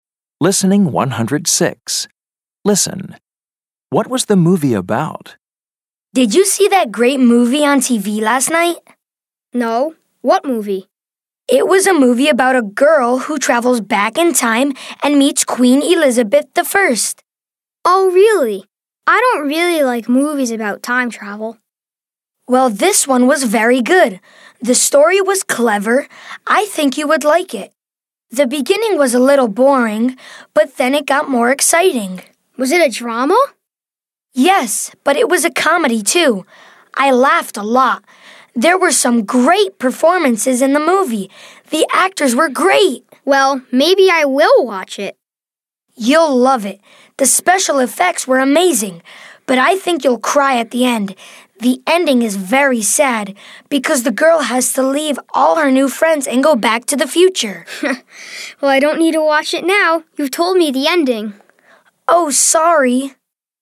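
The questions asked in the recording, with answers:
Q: What was the movie about?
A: A girl who travels back in time and meets Queen Elizabeth I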